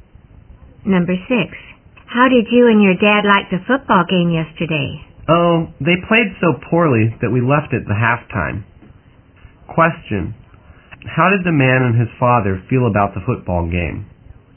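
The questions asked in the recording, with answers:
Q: Question, how did the man and his father feel about the football game?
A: They were disappointed; the teams played poorly, so they left at halftime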